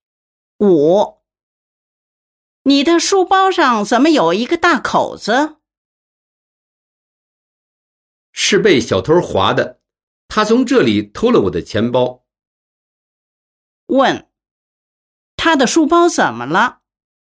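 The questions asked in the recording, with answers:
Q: 他的书包怎么了?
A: 被小偷划了一个大口子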